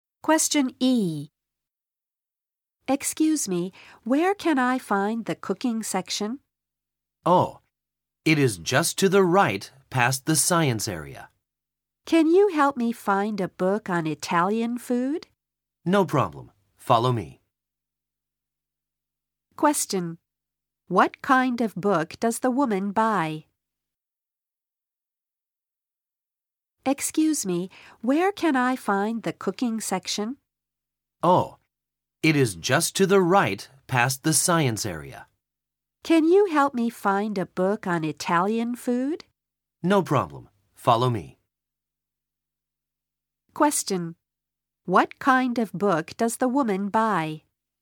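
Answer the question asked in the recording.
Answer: A book on Italian food (a cookbook)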